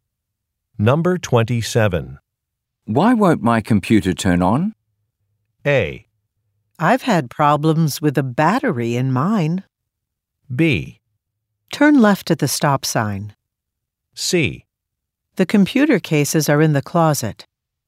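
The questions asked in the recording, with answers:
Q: Why won't my computer turn on?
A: A: I've had problems with a battery in mine.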